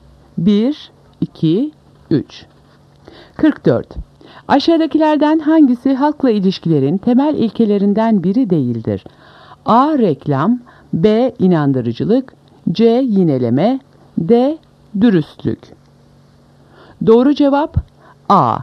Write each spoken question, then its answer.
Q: Aşağıdakilerden hangisi halkla ilişkilerin temel ilkelerinden biri değildir?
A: Doğru cevap A. Reklam.